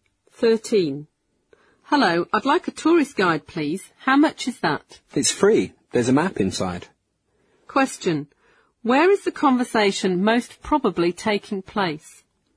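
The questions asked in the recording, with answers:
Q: Where is the conversation most probably taking place?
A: At a tourist information office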